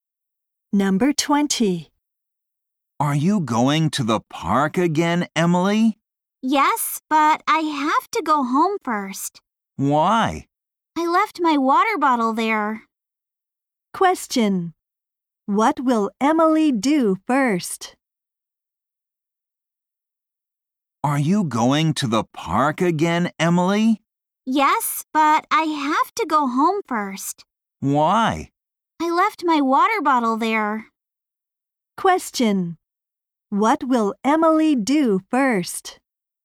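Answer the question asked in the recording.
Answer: Go home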